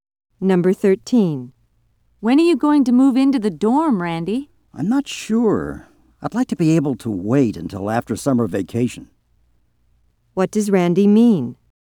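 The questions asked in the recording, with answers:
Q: What does Randy mean?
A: He'd prefer to move into the dorm after summer vacation.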